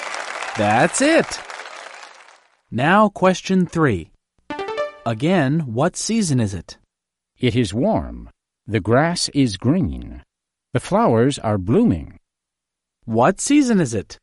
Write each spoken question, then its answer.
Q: Again, what season is it?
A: That's easy. It's spring.